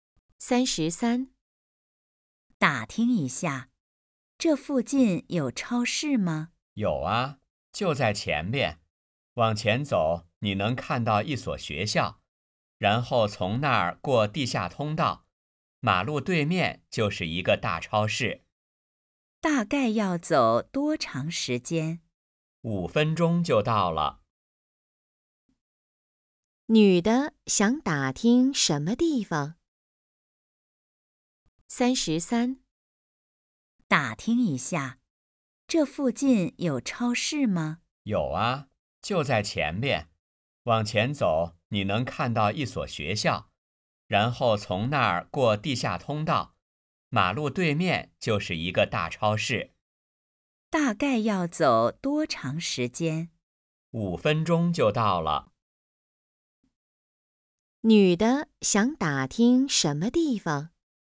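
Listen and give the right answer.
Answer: 超市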